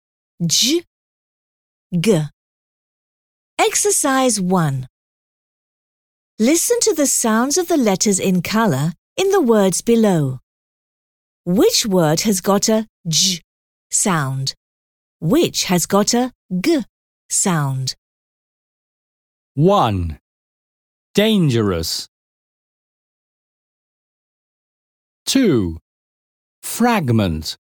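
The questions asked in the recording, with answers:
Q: Which word has got a J sound?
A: 1: Dangerous

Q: Which has got a G sound?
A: 2: Fragment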